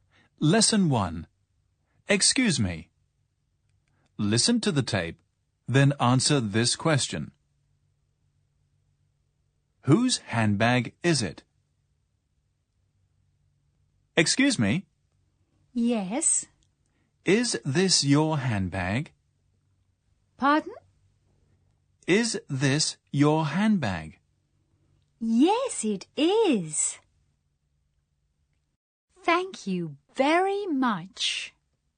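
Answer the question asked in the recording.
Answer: It's the woman's handbag (the person being asked).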